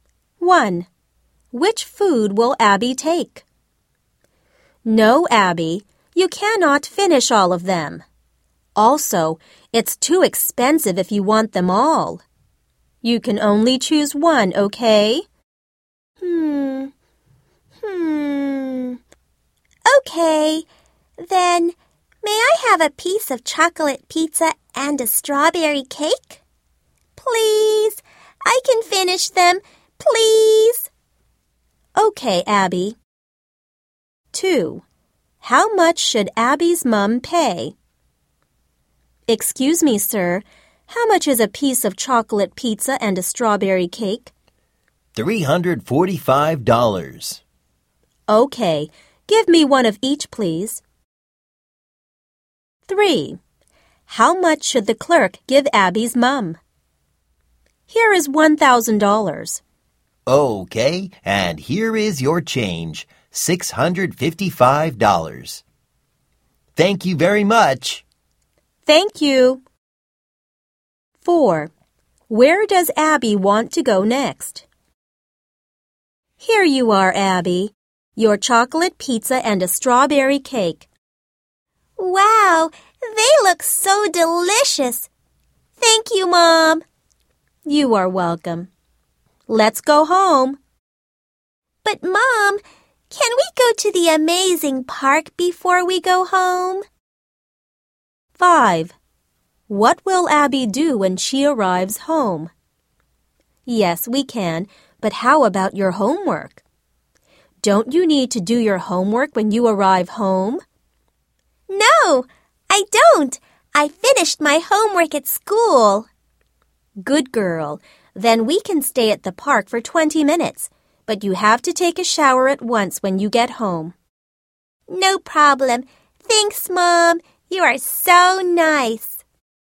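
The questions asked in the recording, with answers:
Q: Which food will Abby take?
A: A piece of chocolate pizza and a strawberry cake

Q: How much should Abby's mum pay?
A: $345

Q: How much should the clerk give Abby's mum?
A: $655

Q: Where does Abby want to go next?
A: The amazing park

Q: What will Abby do when she arrives home?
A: Take a shower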